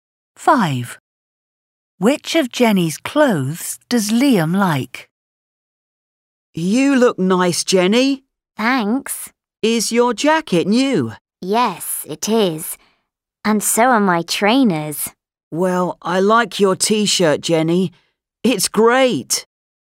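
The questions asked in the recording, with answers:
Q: Which of Jenny's clothes does Liam like?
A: her T-shirt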